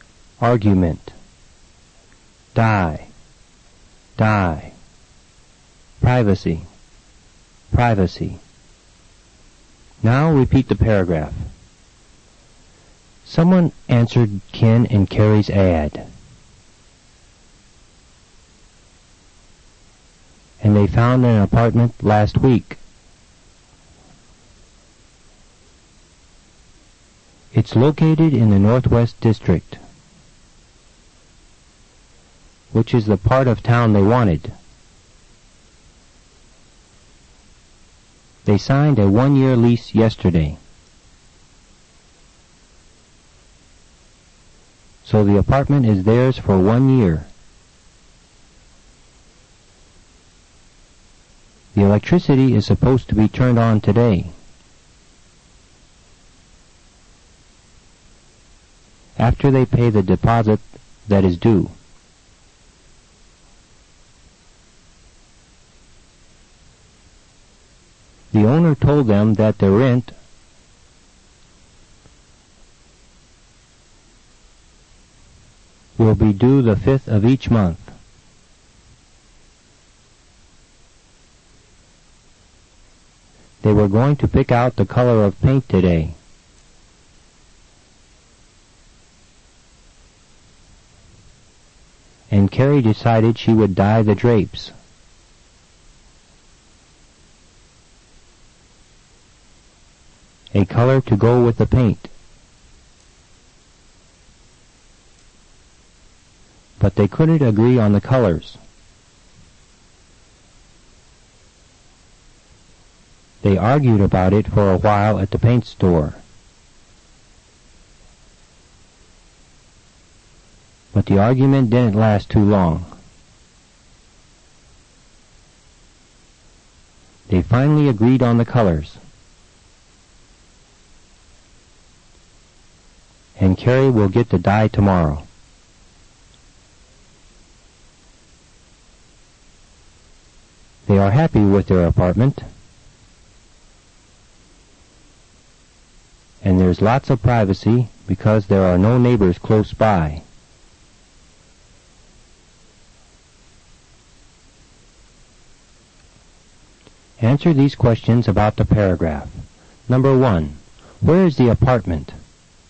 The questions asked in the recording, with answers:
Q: Where is the apartment?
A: It's in the Northwest District.